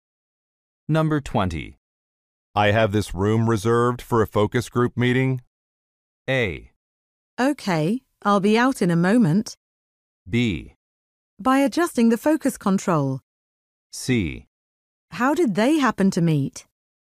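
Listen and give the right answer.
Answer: A: Okay, I'll be out in a moment.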